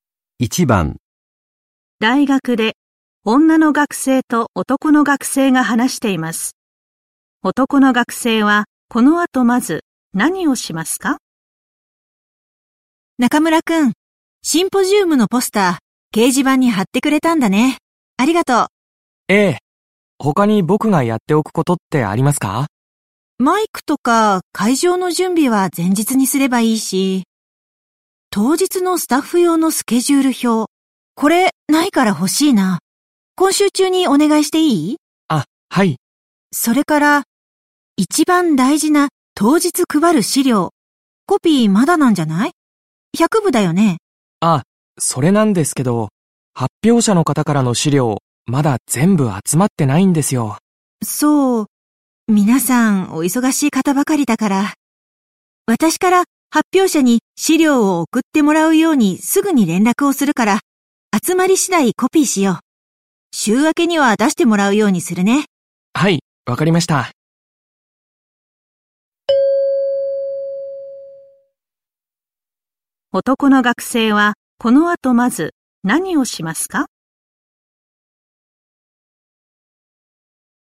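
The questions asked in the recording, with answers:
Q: 男の学生はこの後まず何をしますか?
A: 当日のスタッフ用のスケジュール表を作る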